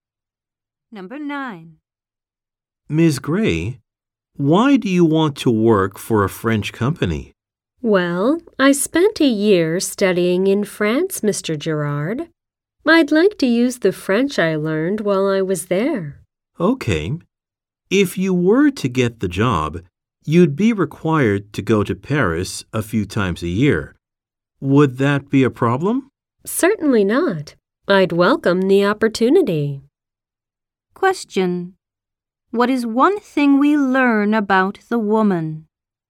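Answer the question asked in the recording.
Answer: She studied in France for a year.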